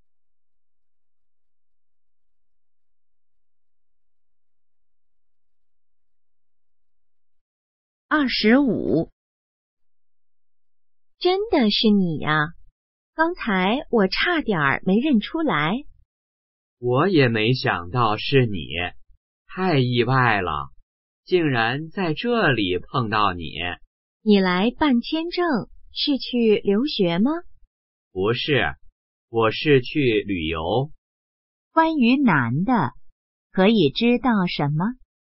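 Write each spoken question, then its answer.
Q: 关于男的,可以知道什么?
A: 他要去旅游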